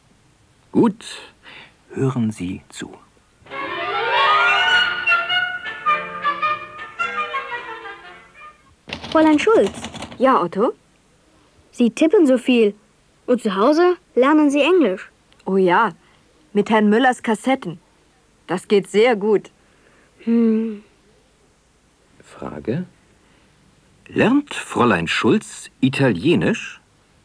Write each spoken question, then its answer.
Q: Lernt Fräulein Schulz Italienisch?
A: Nein, sie lernt nicht Italienisch.